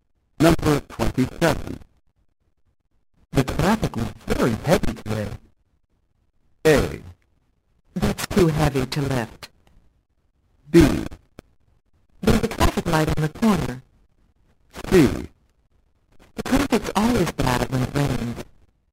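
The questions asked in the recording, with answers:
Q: The traffic was very heavy today.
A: C: The traffic's always bad when it rains.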